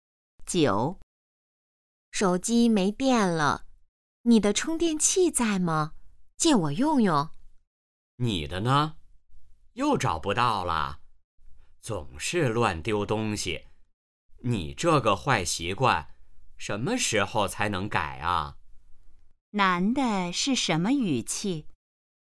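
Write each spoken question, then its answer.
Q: 男的是什么语气?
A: 责备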